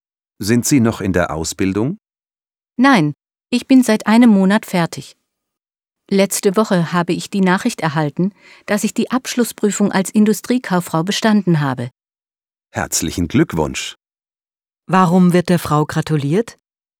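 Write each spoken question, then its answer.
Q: Warum wird der Frau gratuliert?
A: Sie hat die Abschlussprüfung als Industriekauffrau bestanden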